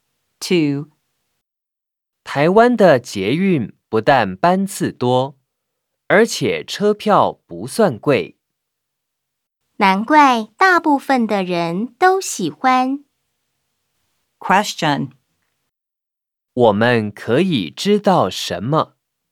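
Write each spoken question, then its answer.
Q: 我们可以知道什么?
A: 台湾的捷运班次多、车票不贵,所以大部分的人都喜欢搭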